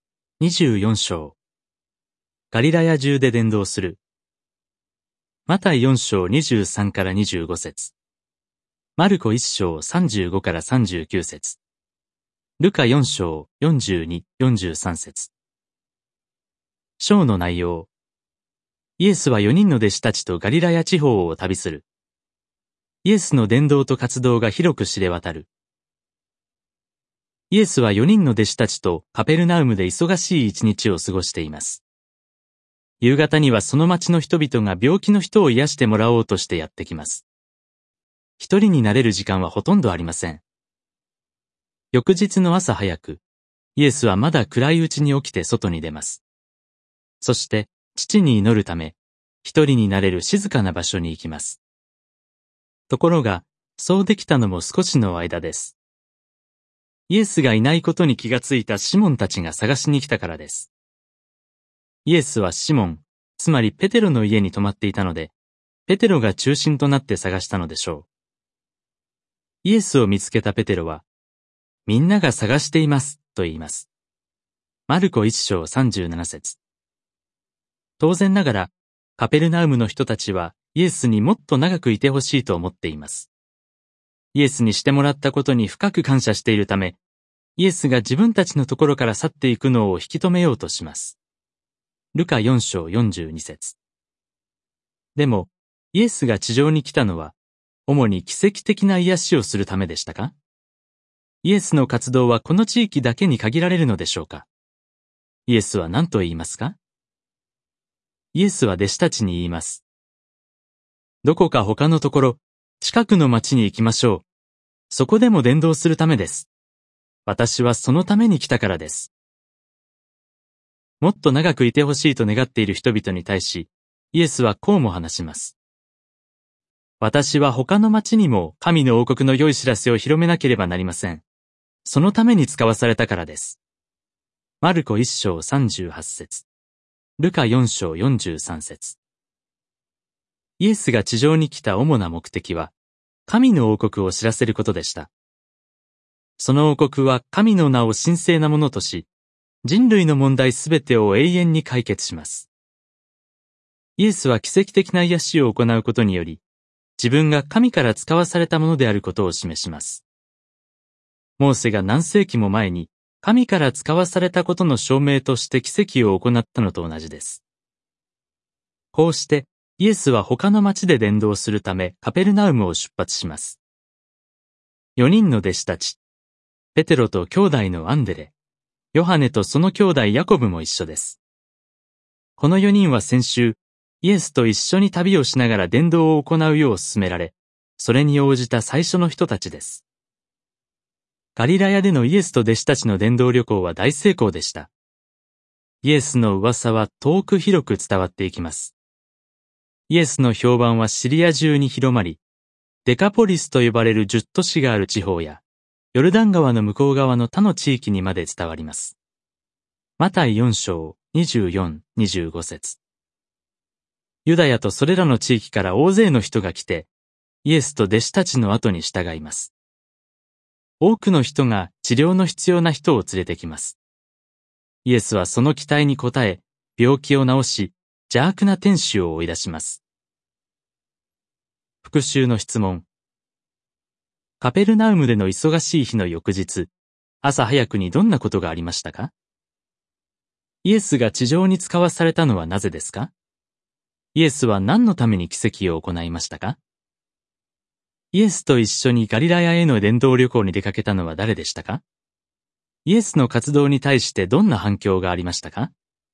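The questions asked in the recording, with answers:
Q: カペルナウムでの忙しい日の翌日、朝早くにどんなことがありましたか?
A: イエスはまだ暗いうちに起きて、一人で祈るため静かな場所に行ったが、シモンたちが探しに来た

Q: イエスが地上に使わされたのはなぜですか?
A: 神の王国の良い知らせを広めるため

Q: イエスは何のために奇跡を行いましたか?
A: 自分が神から使わされたものであることを示すため

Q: イエスと一緒にガリラヤへの伝道旅行に出かけたのは誰でしたか?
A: ペテロ、アンデレ、ヨハネ、ヤコブの4人の弟子

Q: イエスの活動に対してどんな反響がありましたか?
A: 評判がシリア中やデカポリス、ヨルダン川の向こう側まで広まり、大勢の人が従った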